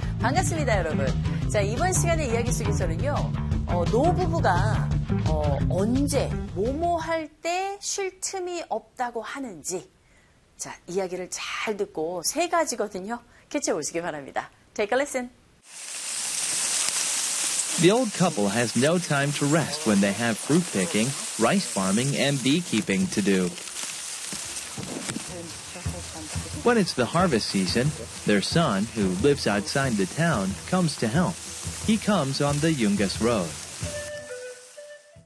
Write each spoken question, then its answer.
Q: 노부부가 언제 뭐뭐 할 때 쉴 틈이 없다고 하는지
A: 첫 번째는 과일을 딸 때, 두 번째는 벼농사 할 때, 그리고 세 번째는 양봉을 해야 할 때, 그럴 때 쉴 틈이 없다고 하죠.